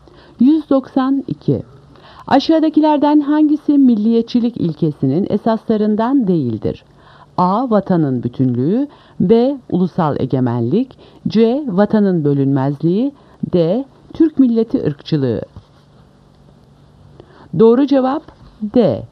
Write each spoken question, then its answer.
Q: Aşağıdakilerden hangisi milliyetçilik ilkesinin esaslarından değildir?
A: Doğru cevap D. Türk milleti ırkçılığı.